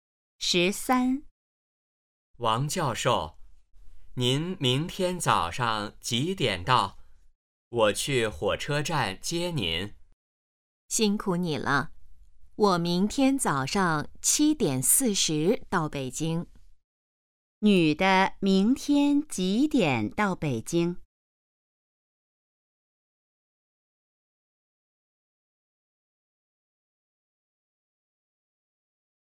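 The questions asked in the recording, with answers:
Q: 女的明天几点到北京?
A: 早上7:40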